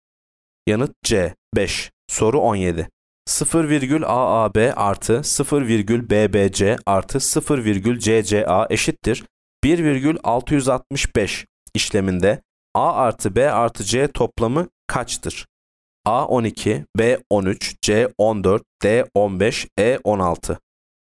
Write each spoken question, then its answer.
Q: 0,AAB artı 0,BBC artı 0,CCA eşittir 1,665 işleminde A artı B artı C toplamı kaçtır?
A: Yanıt D 15.